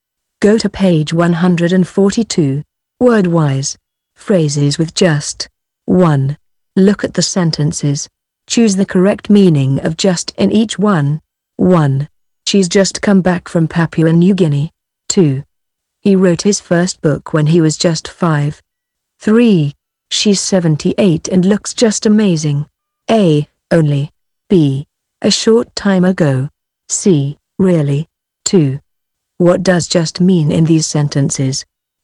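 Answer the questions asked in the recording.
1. B: A short time ago.
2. A: Only.
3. C: Really.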